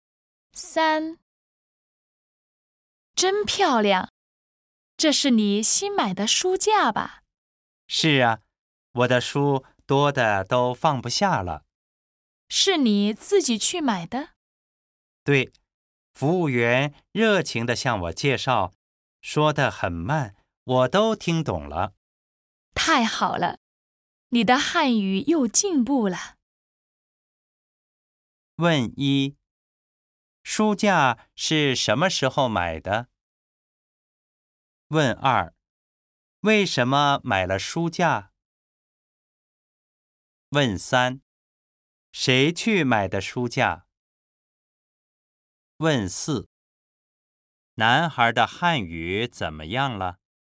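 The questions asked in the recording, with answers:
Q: 为什么买了书架?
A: 书多得放不下了

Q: 谁去买的书架?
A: 他自己

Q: 男孩的汉语怎么样了?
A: 又进步了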